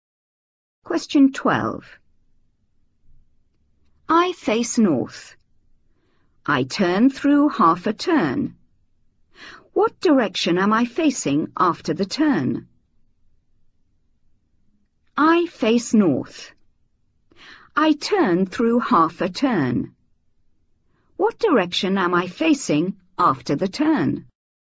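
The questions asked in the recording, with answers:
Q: What direction am I facing after the turn?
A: South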